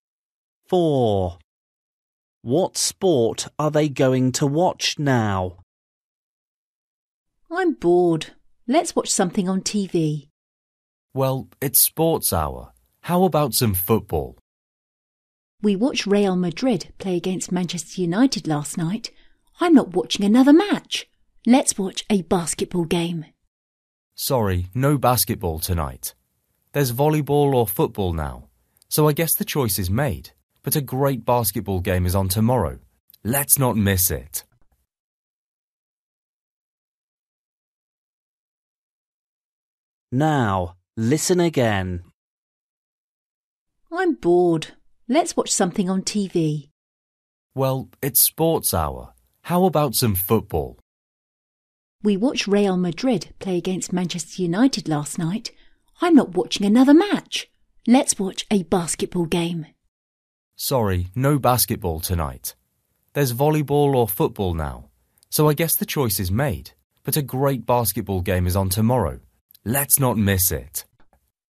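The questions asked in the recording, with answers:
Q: What sport are they going to watch now?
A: volleyball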